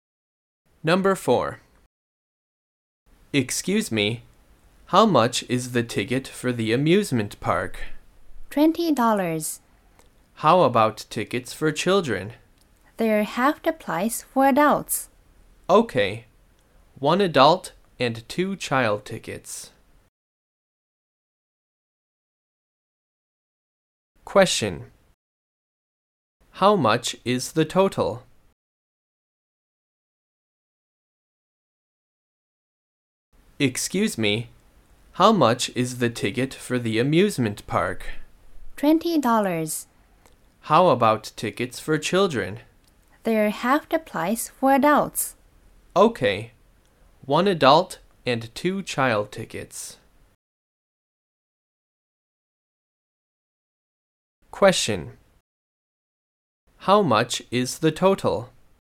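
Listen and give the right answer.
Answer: $40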